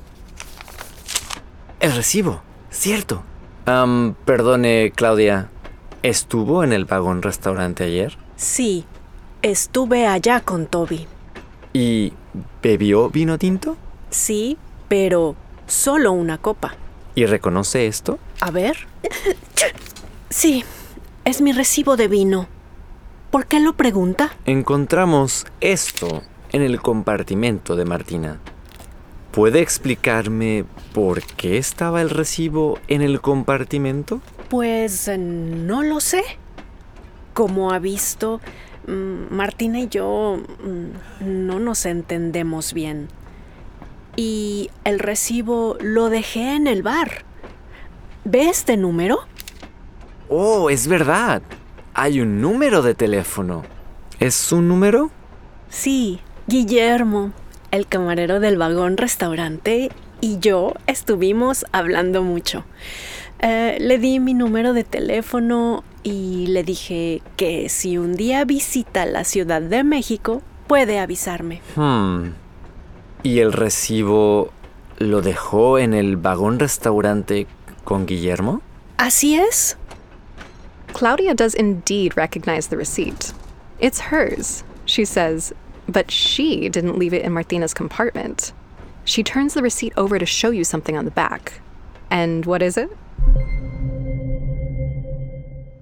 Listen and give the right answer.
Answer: Right, un número de teléfono.